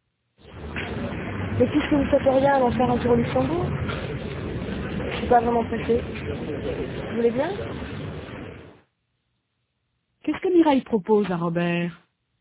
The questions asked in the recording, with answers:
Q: Qu'est-ce que Mireille propose à Robert?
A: D'aller faire un tour au Luxembourg.